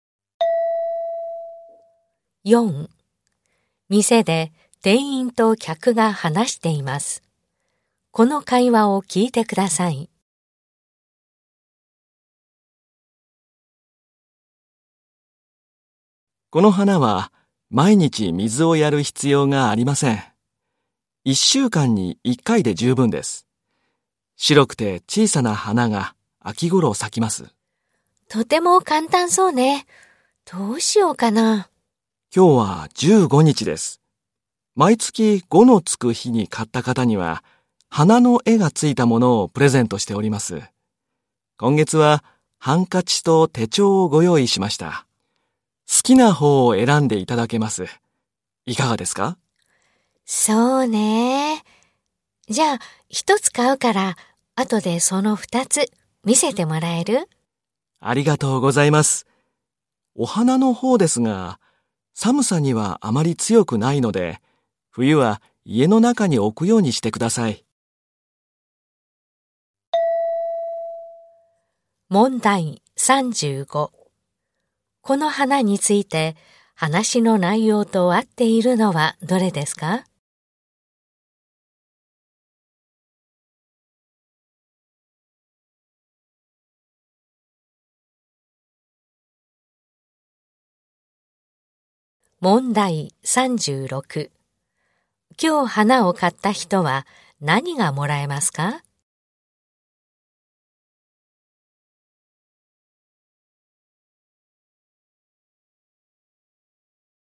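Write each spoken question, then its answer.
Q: 今日花を買った人は何がもらえますか?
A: 花の絵がついたハンカチか手帳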